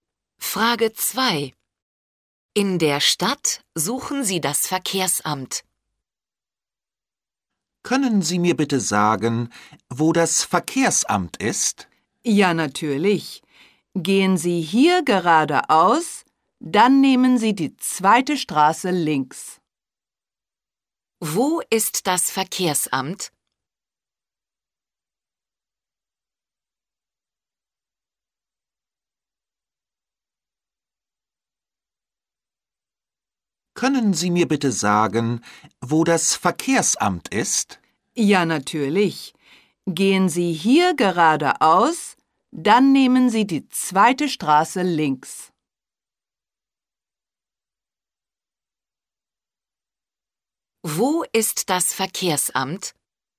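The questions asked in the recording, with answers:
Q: Wo ist das Verkehrsamt?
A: geradeaus, dann die zweite Straße links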